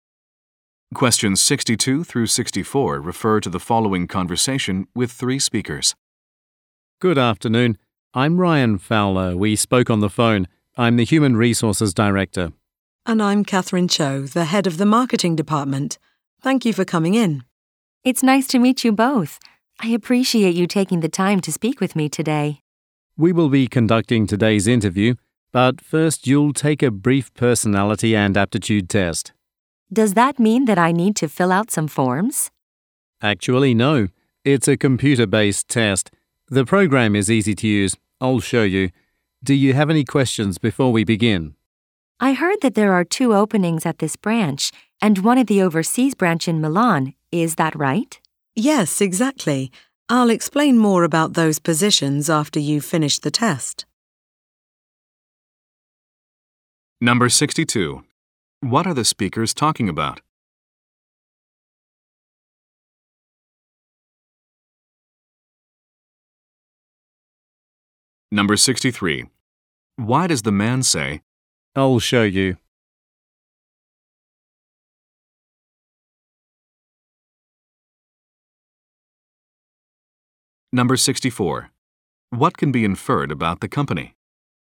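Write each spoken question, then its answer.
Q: What are the speakers talking about?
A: A job interview

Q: What can be inferred about the company?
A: It has an overseas branch in Milan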